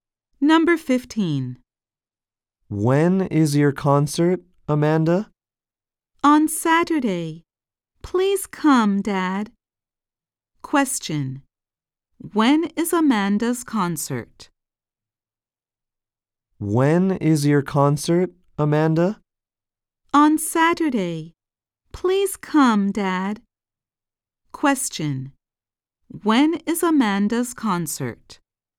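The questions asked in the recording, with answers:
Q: When is Amanda's concert?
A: On Saturday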